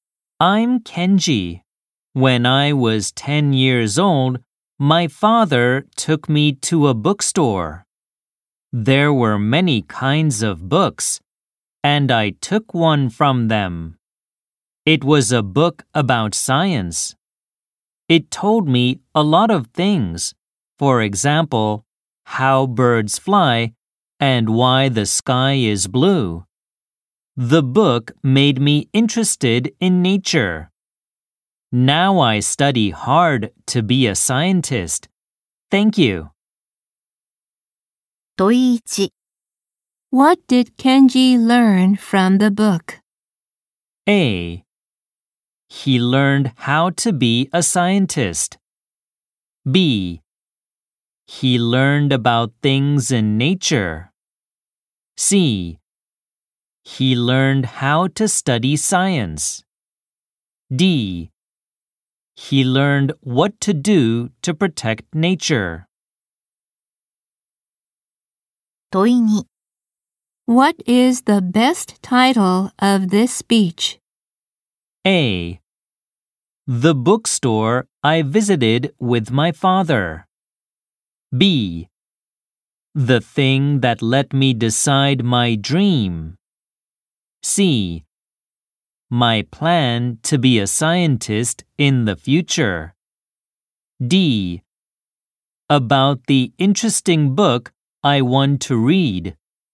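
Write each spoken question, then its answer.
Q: What did Kenji learn from the book?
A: B: He learned about things in nature.

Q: What is the best title of this speech?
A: B: The thing that let me decide my dream.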